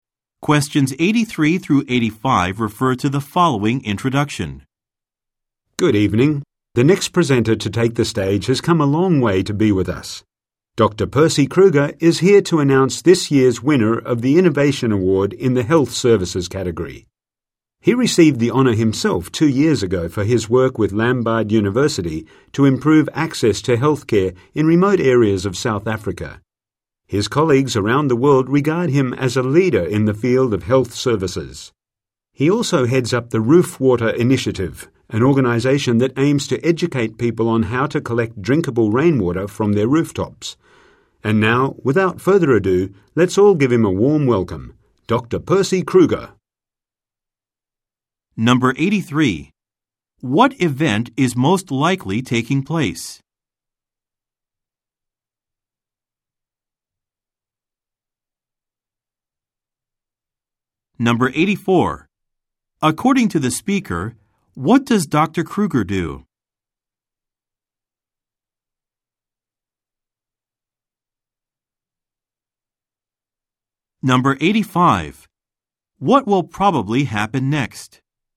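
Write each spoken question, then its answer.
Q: What event is most likely taking place?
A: An awards ceremony

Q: What will probably happen next?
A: Dr. Kruger will announce this year's Innovation Award winner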